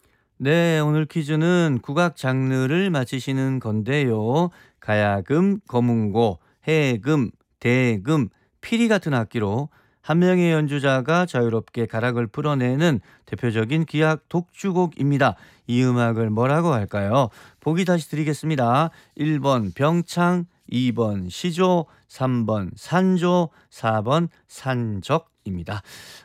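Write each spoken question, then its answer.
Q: 이 음악을 뭐라고 할까요?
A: 3: 산조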